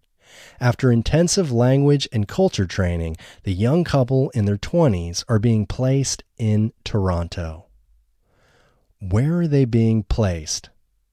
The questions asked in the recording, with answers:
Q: Where are they being placed?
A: They are being placed in Toronto.